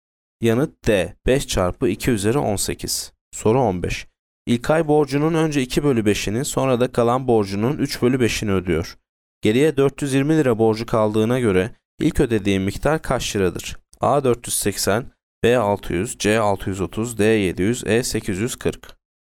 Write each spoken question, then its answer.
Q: Geriye 420 lira borcu kaldığına göre ilk ödediği miktar kaç liradır?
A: Yanıt D 700.